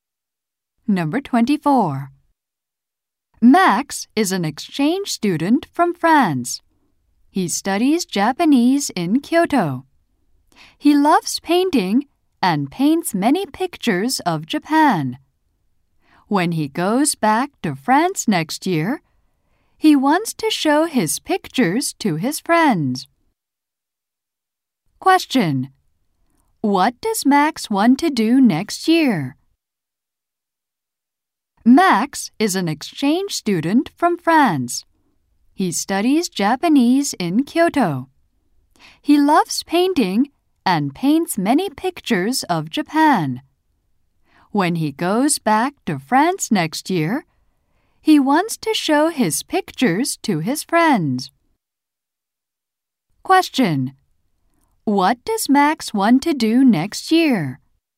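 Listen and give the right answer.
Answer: Show his pictures to his friends in France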